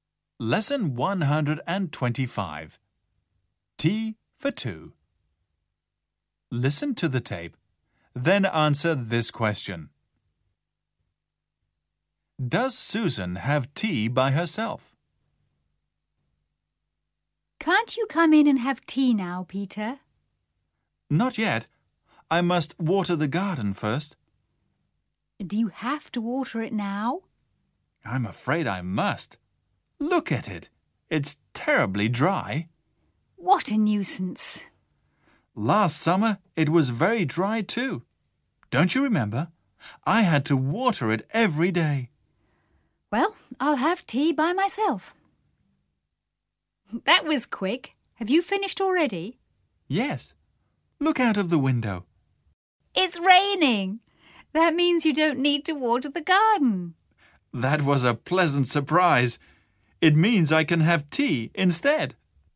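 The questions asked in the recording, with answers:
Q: Does Susan have tea by herself?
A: No, she doesn't. It starts raining, so Peter doesn't need to water the garden and has tea with her.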